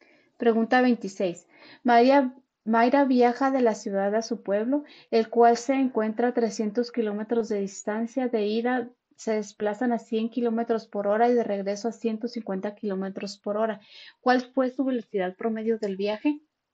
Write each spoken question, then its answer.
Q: ¿Cuál fue su velocidad promedio del viaje?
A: Y la respuesta correcta es la C, 120 kilómetros por hora.